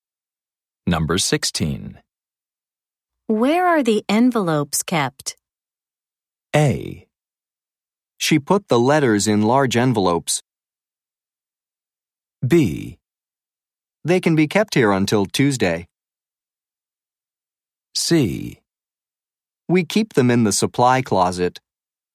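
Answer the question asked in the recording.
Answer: C: We keep them in the supply closet.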